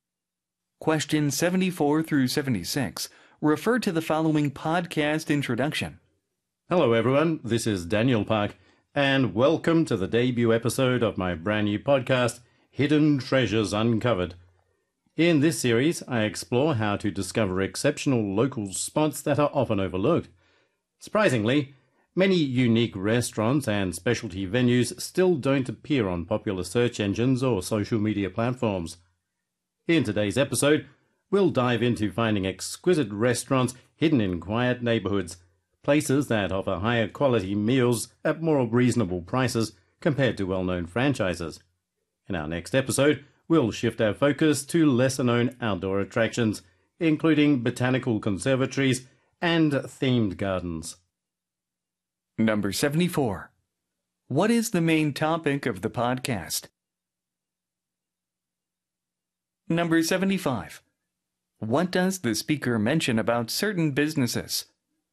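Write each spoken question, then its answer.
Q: What is the main topic of the podcast?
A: Discovering overlooked local spots

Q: What does the speaker mention about certain businesses?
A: They don't appear on popular search engines or social media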